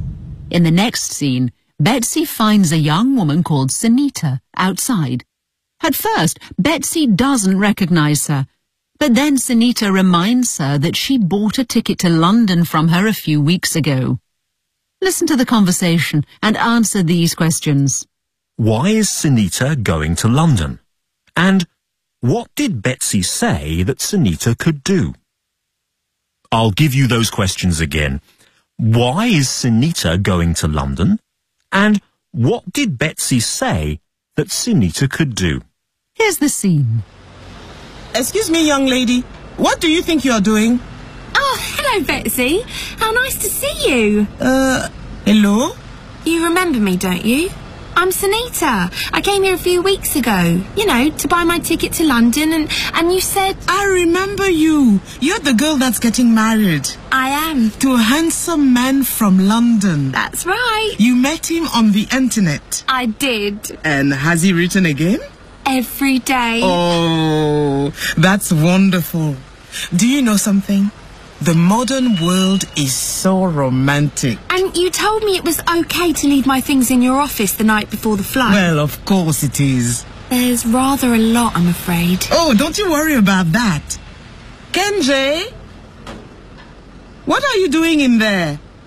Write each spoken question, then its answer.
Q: Why is Sunita going to London?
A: She's getting married to a man she met on the internet.

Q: And what did Betsy say that Sunita could do?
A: She said that she could leave her things in the office the night before the flight.